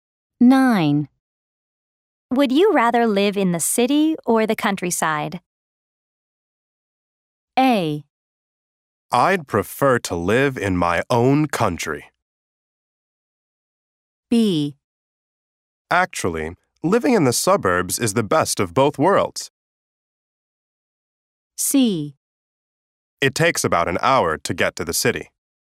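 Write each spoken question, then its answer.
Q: Would you rather live in the city or the countryside?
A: B: Actually, living in the suburbs is the best of both worlds.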